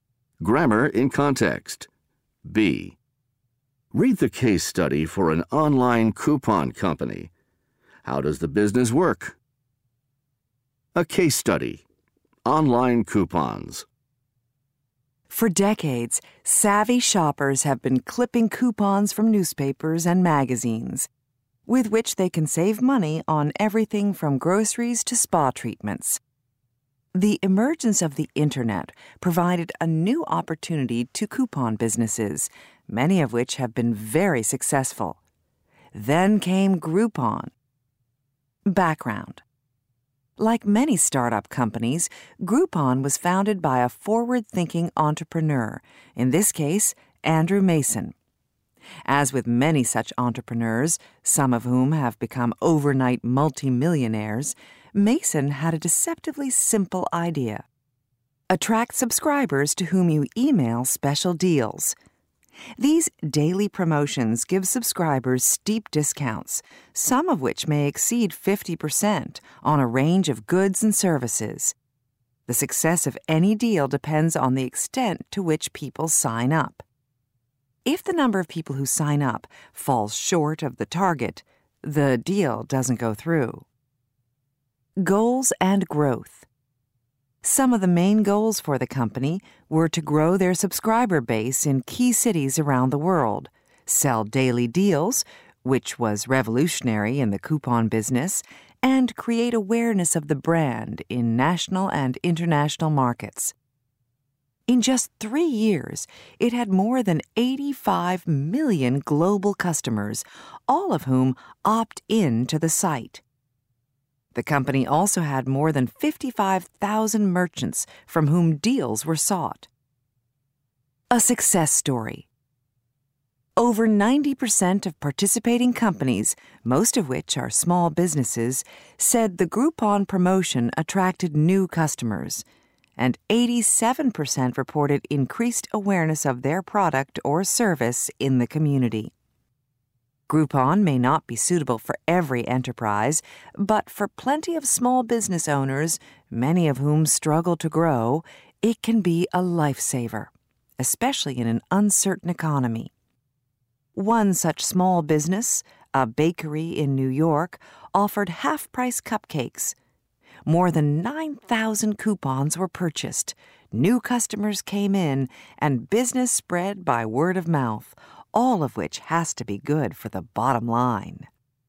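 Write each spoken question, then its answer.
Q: How does the business work?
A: It emails subscribers daily deals with steep discounts; a deal goes through only if enough people sign up.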